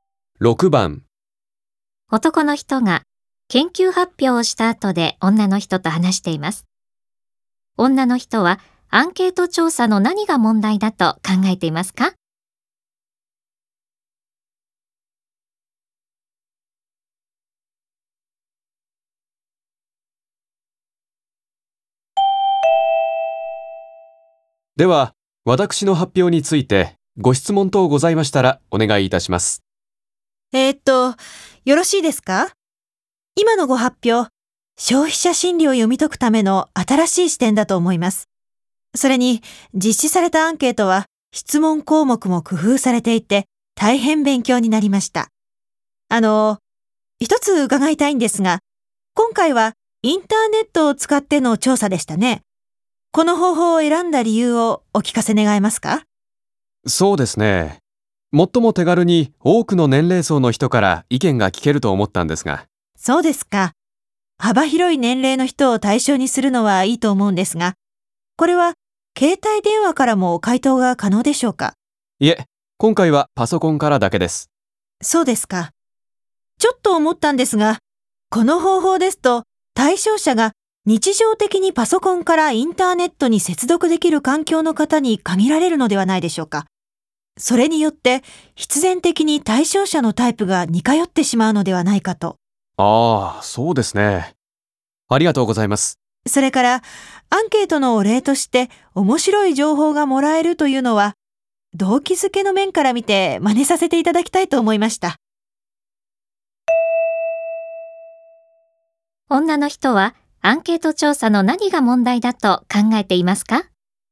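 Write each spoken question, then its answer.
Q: 女の人はアンケート調査の何が問題だと考えていますか?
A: パソコンからインターネットに接続できる人に対象者が限られ、対象者のタイプが似てしまうこと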